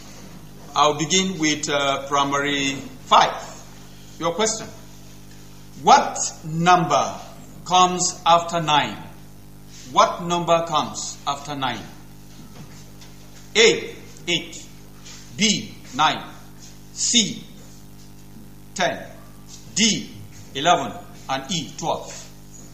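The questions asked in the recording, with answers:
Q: What number comes after 9?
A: C: 10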